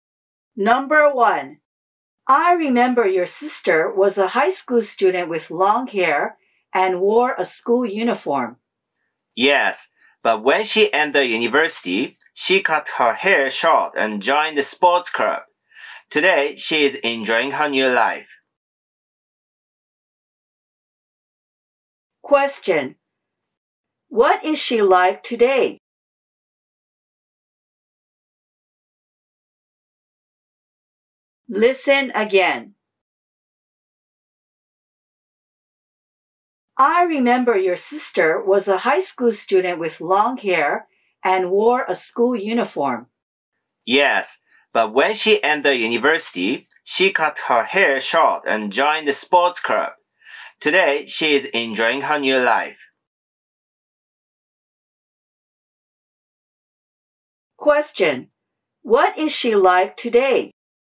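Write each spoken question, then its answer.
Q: What is she like today?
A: She has short hair, is a university student and is in a sports club.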